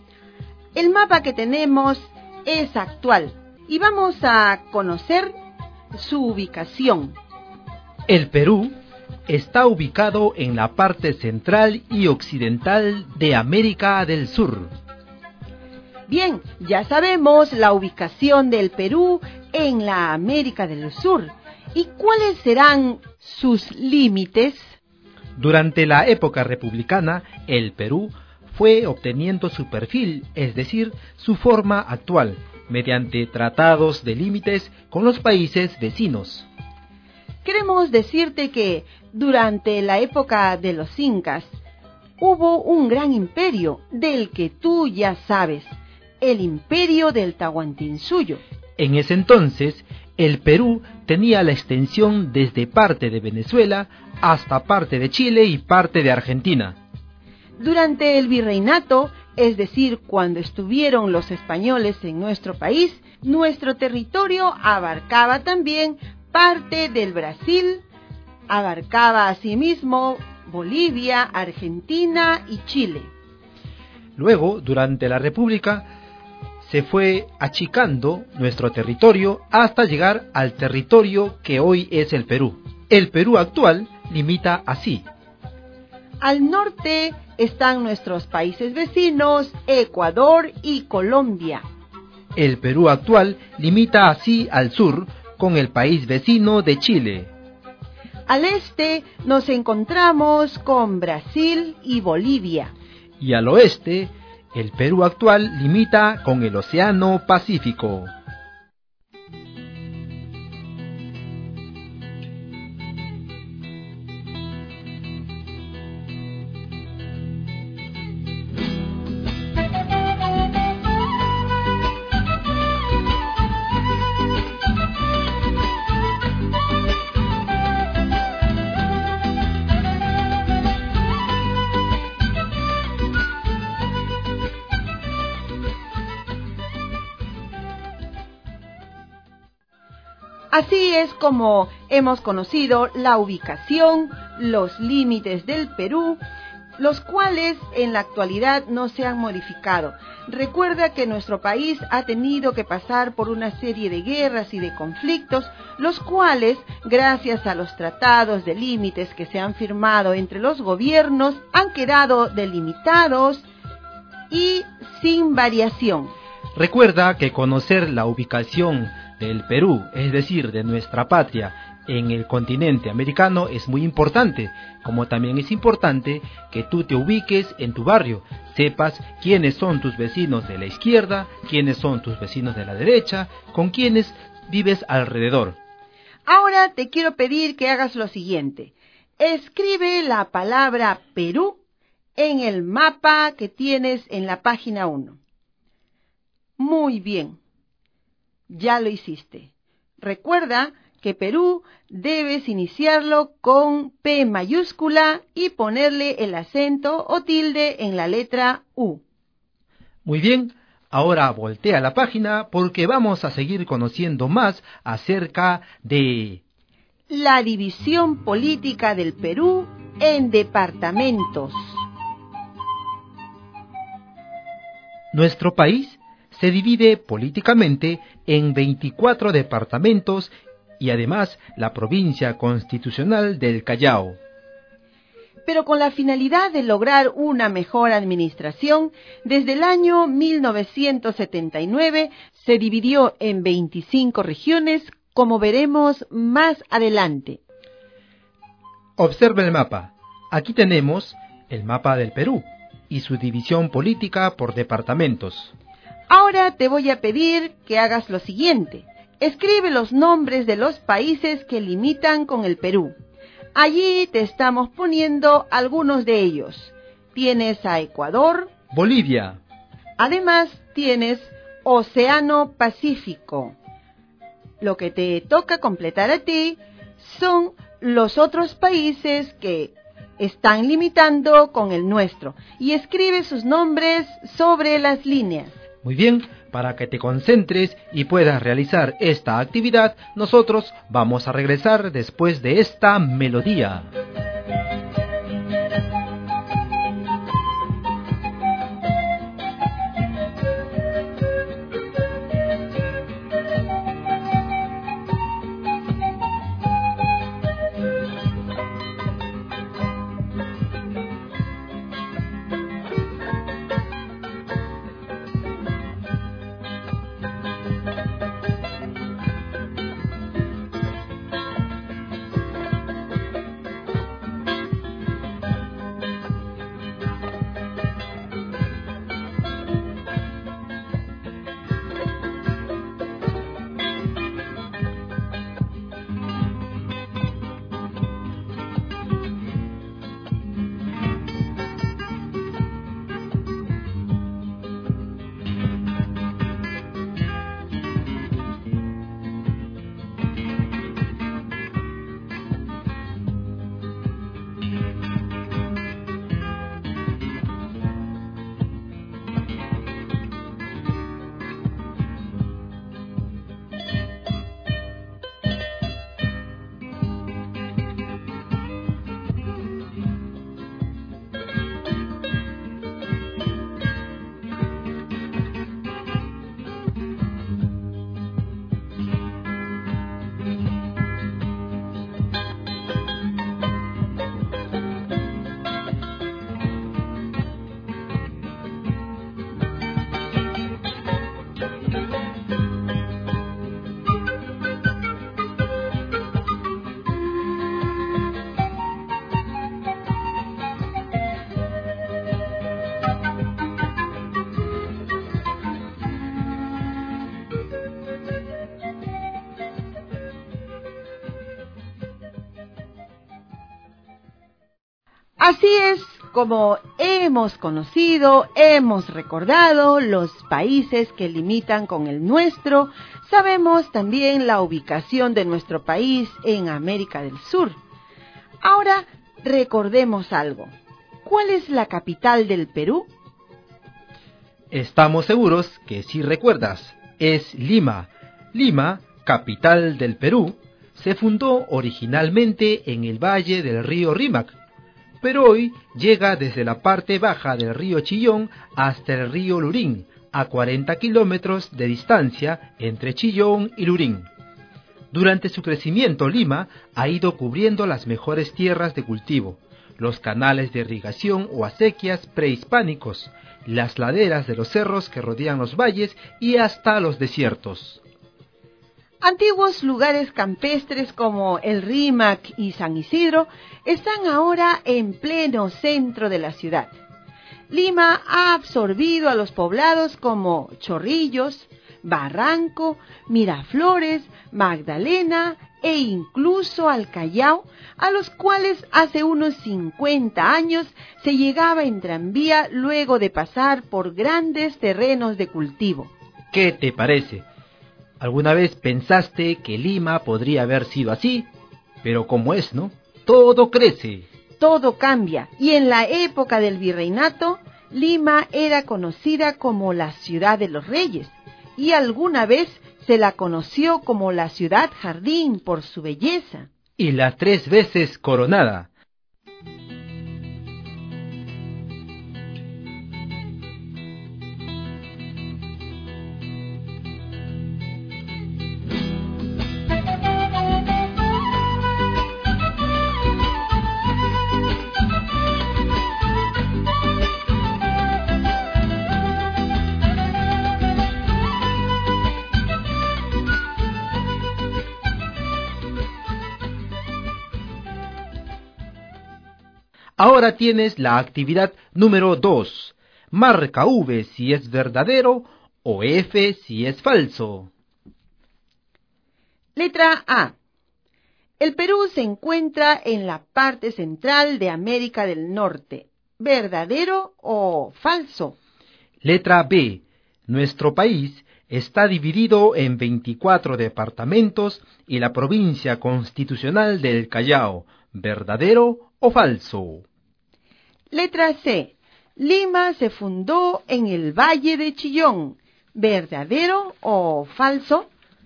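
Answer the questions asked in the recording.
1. Falso
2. Verdadero
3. Falso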